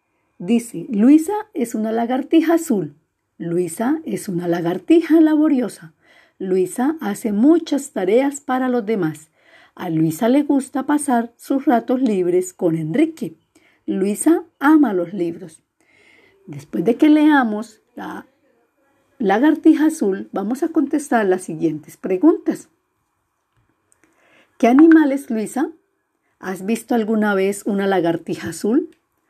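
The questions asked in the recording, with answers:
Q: ¿Qué animal es Luisa?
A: Una lagartija azul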